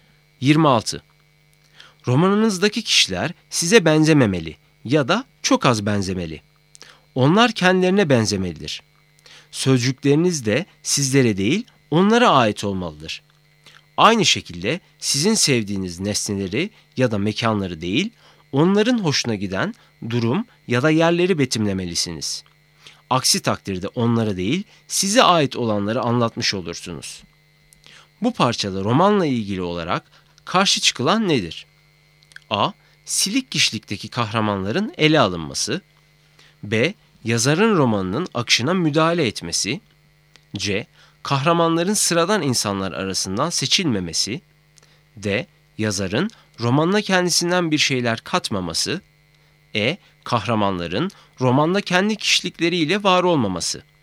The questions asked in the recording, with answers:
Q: Bu parçada romanla ilgili olarak karşı çıkılan nedir?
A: Doğru cevap E. Kahramanların romanda kendi kişilikleriyle var olmaması.